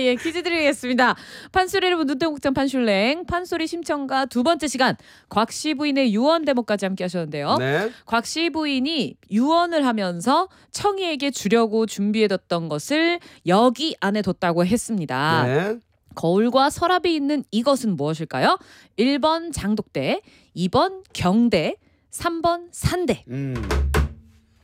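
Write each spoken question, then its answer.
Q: 거울과 서랍이 있는 이것은 무엇일까요? 1번 장독대, 2번 경대, 3번 산대.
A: 2: 경대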